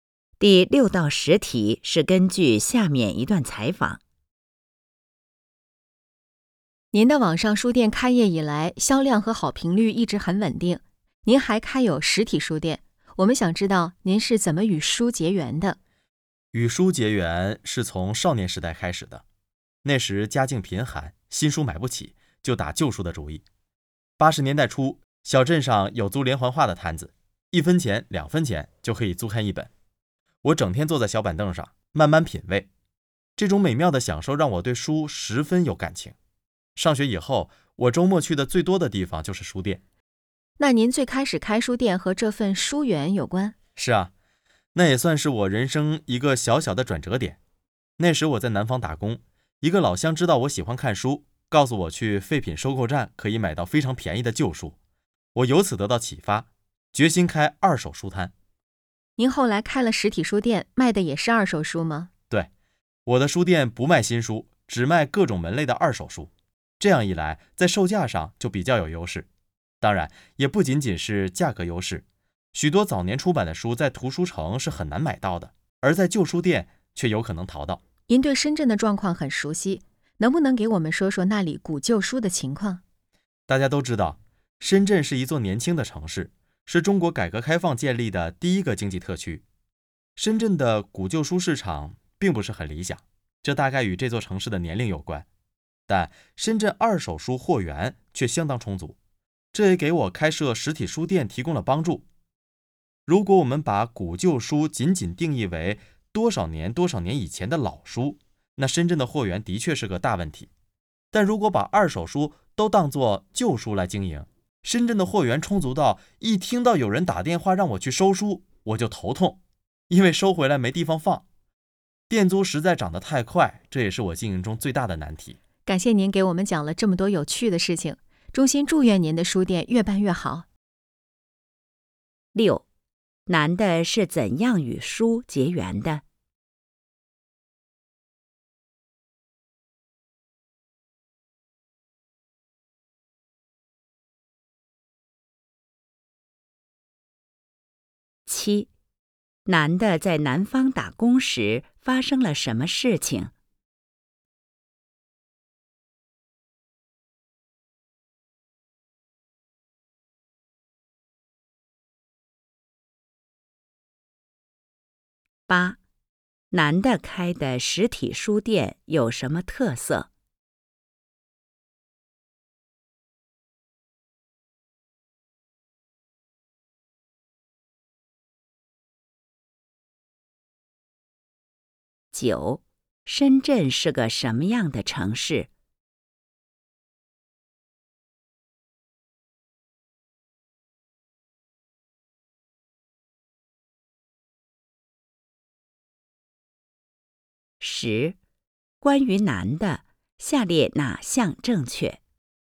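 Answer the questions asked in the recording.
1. 少年时家境贫寒,租看连环画
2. 老乡告诉他去废品收购站可以买到便宜的旧书
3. 不卖新书,只卖二手书
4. 年轻的城市,中国第一个经济特区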